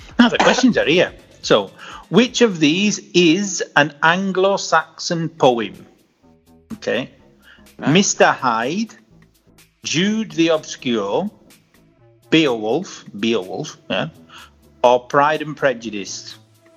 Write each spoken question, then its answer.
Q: So, which of these is an Anglo-Saxon poem?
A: No, Beowulf.